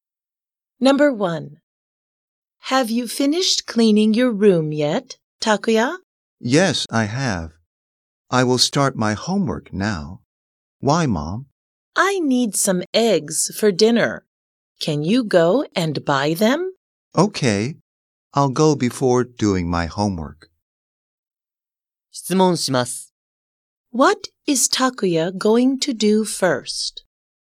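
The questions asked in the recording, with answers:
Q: What is Takuya going to do first?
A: Go and buy some eggs for his mother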